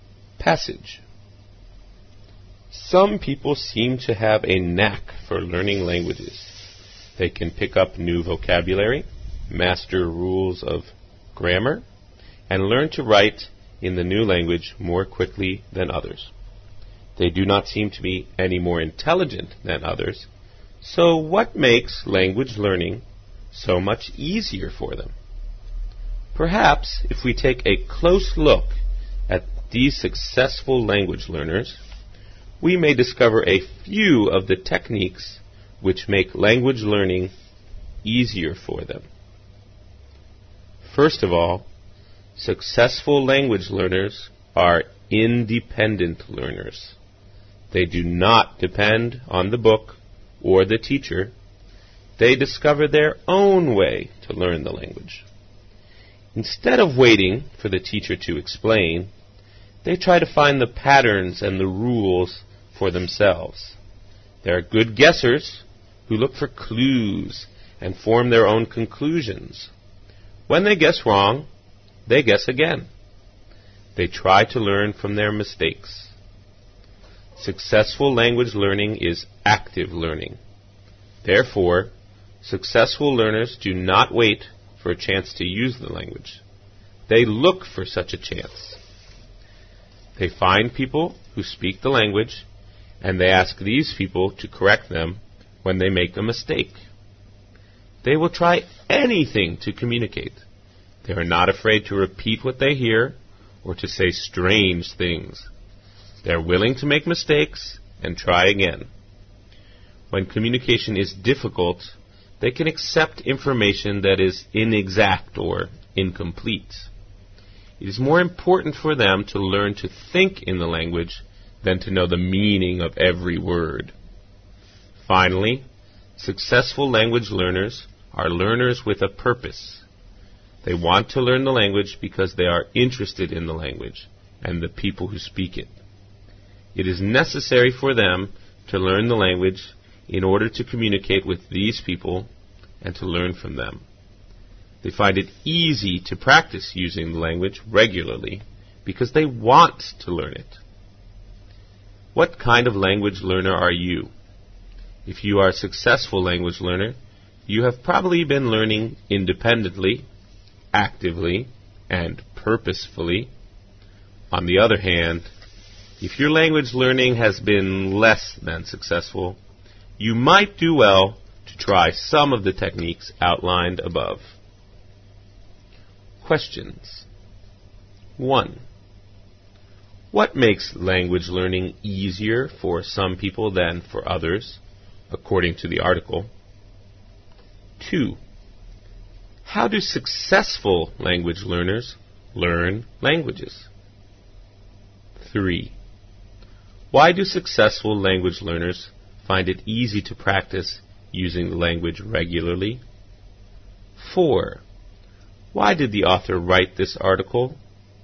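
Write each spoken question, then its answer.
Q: What makes language learning easier for some people than for others, according to the article?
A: The techniques they use: they learn independently, actively and with a purpose.

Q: How do successful language learners learn languages?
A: Independently, actively and purposefully.

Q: Why do successful language learners find it easy to practice using the language regularly?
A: Because they want to learn it.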